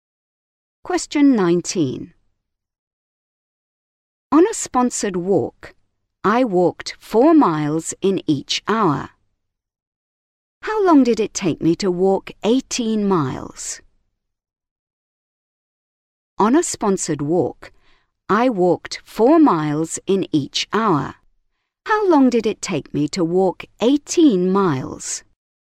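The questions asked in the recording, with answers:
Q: How long did it take me to walk 18 miles?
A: 4.5 hours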